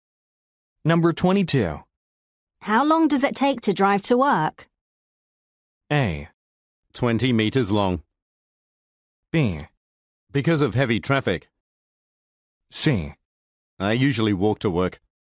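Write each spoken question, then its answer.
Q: How long does it take to drive to work?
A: C: I usually walk to work.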